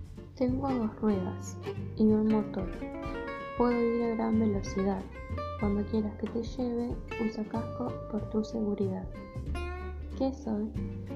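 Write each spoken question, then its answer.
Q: ¿Qué soy?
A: la moto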